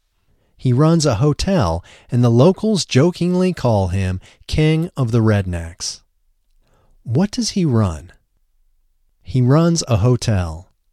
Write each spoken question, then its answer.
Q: What does he run?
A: He runs a hotel.